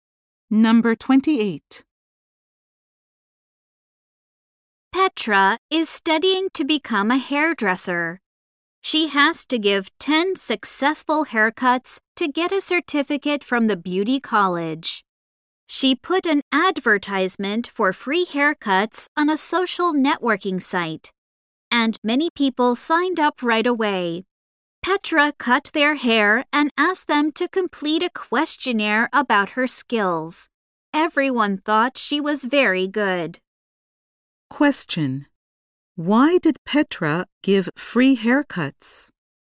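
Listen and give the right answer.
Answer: To get a certificate from the beauty college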